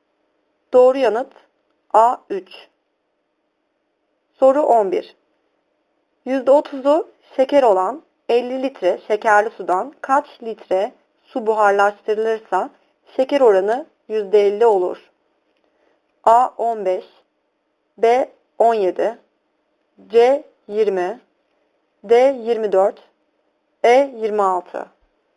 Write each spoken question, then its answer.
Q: %30'u şeker olan 50 litre şekerli sudan kaç litre su buharlaştırılırsa şeker oranı %50 olur?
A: Doğru yanıt C 20.